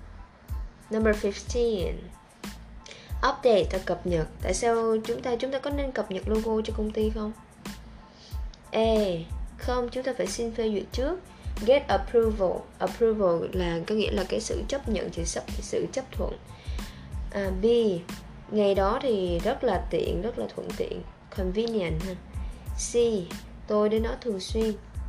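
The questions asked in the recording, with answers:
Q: Tại sao chúng ta có nên cập nhật logo cho công ty không?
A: A: Không, chúng ta phải xin phê duyệt trước.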